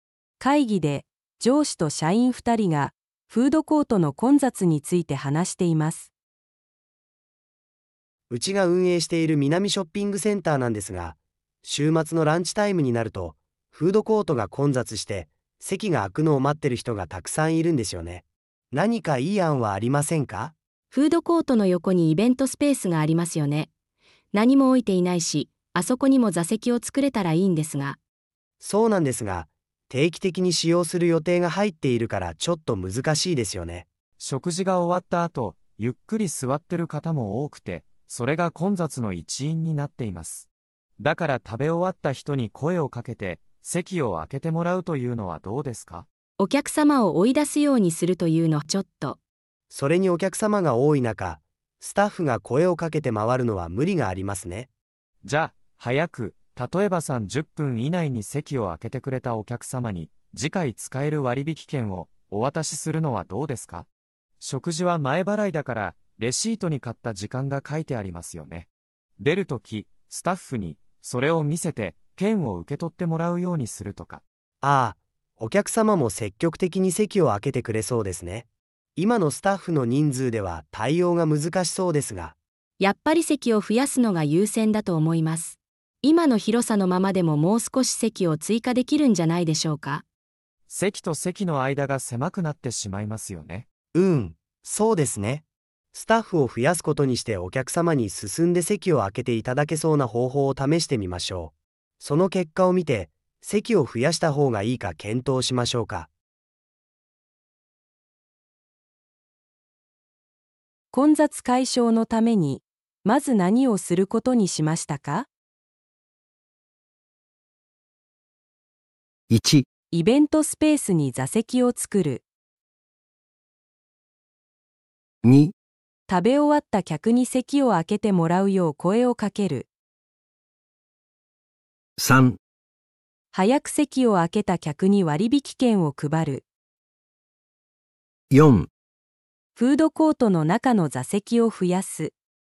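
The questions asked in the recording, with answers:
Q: 混雑解消のためにまず何をすることにしましたか?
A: 3: 早く席を空けた客に割引券を配る。

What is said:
会議で上司と社員2人がフードコートの混雑について話しています。
男1:うちが運営している南ショッピングセンターなんですが、週末のランチタイムになるとフードコートが混雑して席が空くのを待ってる人がたくさんいるんですよね。何かいい案はありませんか?
女:フードコートの横にイベントスペースがありますよね? 何も置いていないし、あそこにも座席を作れたらいいんですが・・・。
男1:そうなんですが、定期的に使用する予定が入っているからちょっと難しいですよね。
男2:食事が終わった後ゆっくり座ってる方も多くて、それが混雑の一因になっています。だから食べ終わった人に声をかけて席を空けてもらうと言うのはどうですか?
女:お客様を追い出すようにするというのはちょっと・・・。
男1:それにお客様が多い中、スタッフが声をかけて回るのは無理がありますね。
男2:じゃ、早く、例えば30分以内に席を空けてくれたお客様に次回使える割引券をお渡しするのはどうですか? 食事は前払いだからレシートに買った時間が書いてありますよね。出る時、スタッフにそれを見せて券を受け取ってもらうようにするとか・・・。
男1:あぁ、お客様も積極的に席を空けてくれそうですね。今のスタッフの人数では対応が難しそうですが・・・。
女:やっぱり席を増やすのが優先だと思います。今の広さのままでももう少し席を追加できるんじゃないでしょうか?
男2:席と席の間が狭くなってしまいますよね?
スタッフを増やすことにしてお客様に進んで席を空けていただけそうな方法を試してみましょう。その結果を見て、席を増やした方がいいか検討しましょうか。
3.早く席を空けた客に割引券を配る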